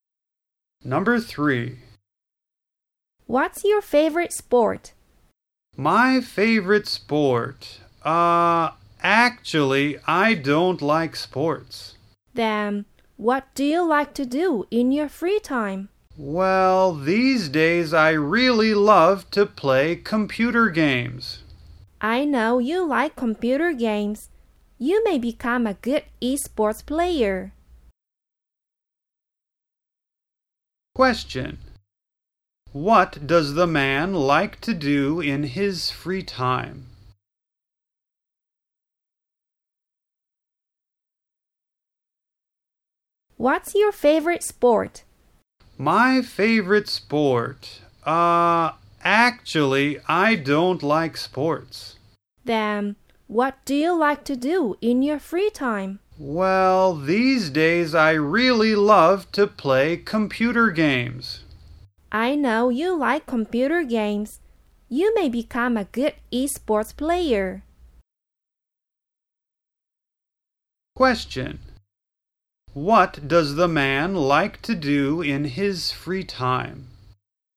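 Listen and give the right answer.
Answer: Play computer games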